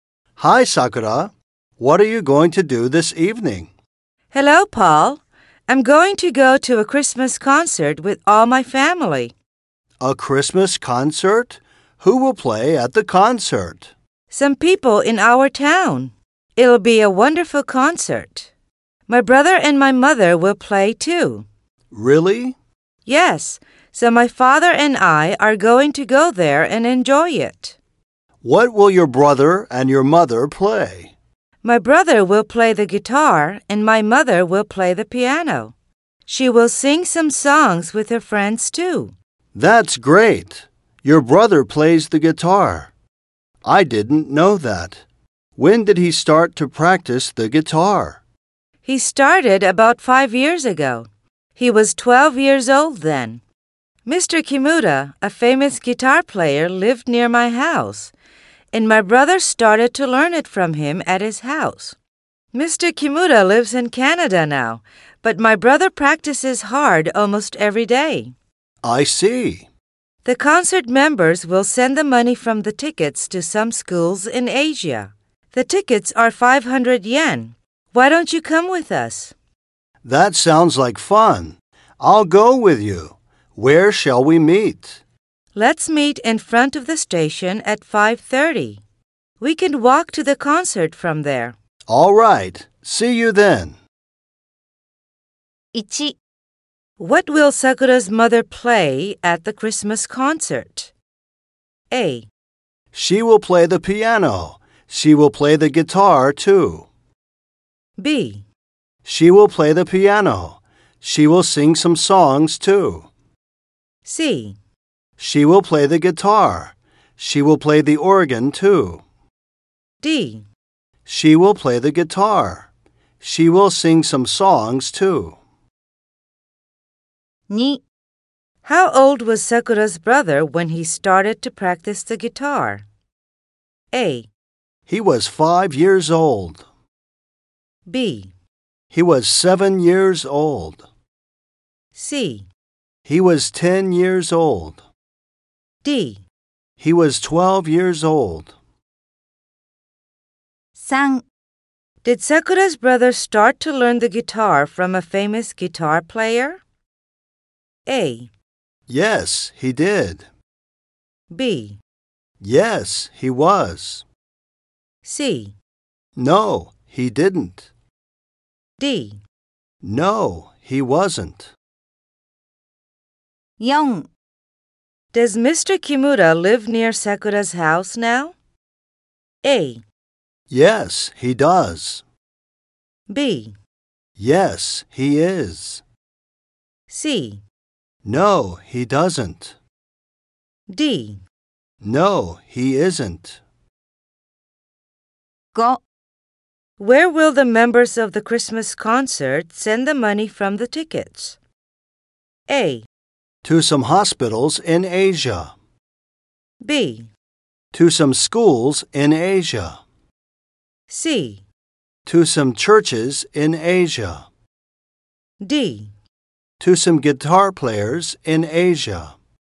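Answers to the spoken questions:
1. B: She will play the piano. She will sing some songs, too.
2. D: He was 12 years old.
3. A: Yes, he did.
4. C: No, he doesn't.
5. B: To some schools in Asia.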